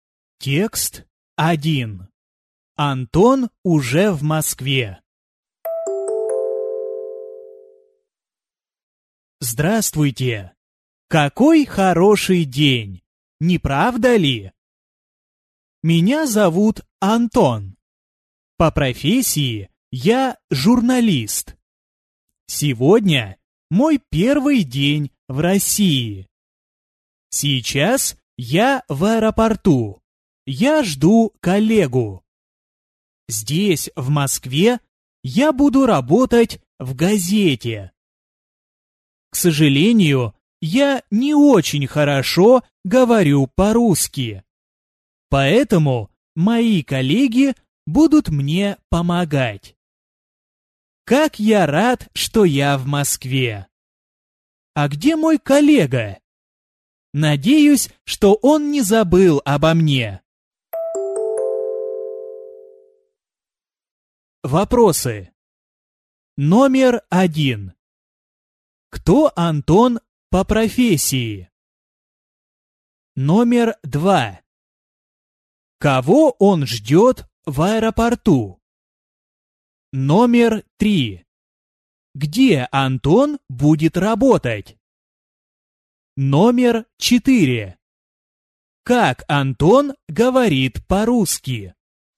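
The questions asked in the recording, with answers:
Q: Кто Антон по профессии?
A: Журналист

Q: Кого он ждет в аэропорту?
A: Коллегу

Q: Где Антон будет работать?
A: В газете в Москве

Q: Как Антон говорит по-русски?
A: Не очень хорошо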